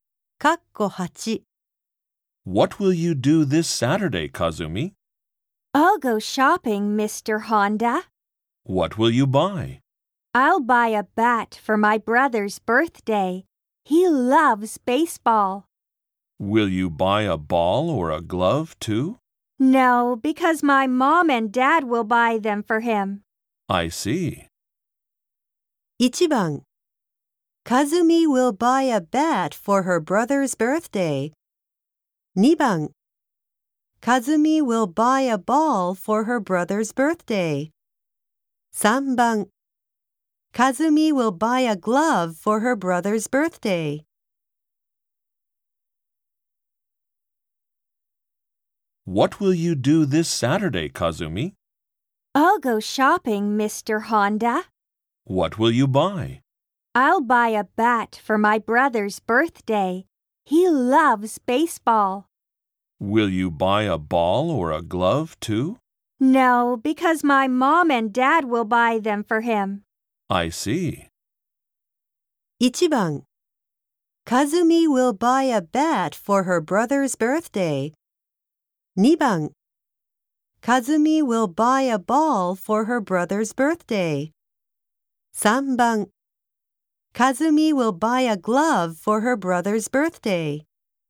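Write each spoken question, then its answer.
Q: 1番 Kazumi will buy a bat for her brother's birthday. 2番 Kazumi will buy a ball for her brother's birthday. 3番 Kazumi will buy a glove for her brother's birthday.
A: 1: Kazumi will buy a bat for her brother's birthday.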